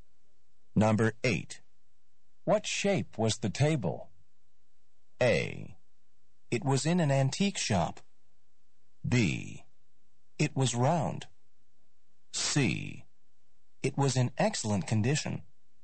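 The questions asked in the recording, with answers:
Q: What shape was the table?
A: B: It was round.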